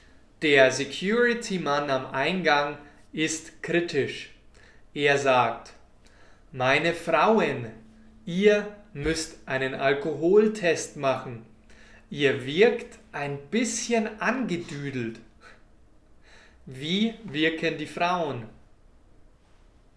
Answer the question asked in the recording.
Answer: Angedüdelt. Sie wirken angedüdelt.